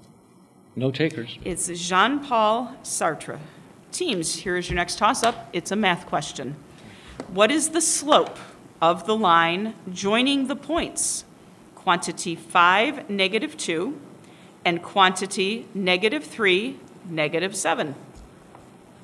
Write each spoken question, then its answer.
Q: What is the slope of the line joining the points quantity 5, negative 2, and quantity negative 3, negative 7?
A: The answer is 5/8.